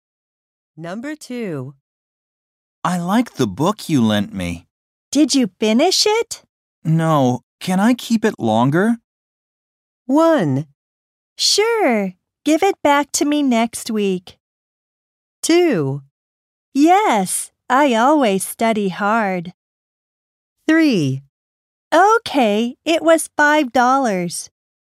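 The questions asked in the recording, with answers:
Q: No. Can I keep it longer?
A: 1: Sure. Give it back to me next week.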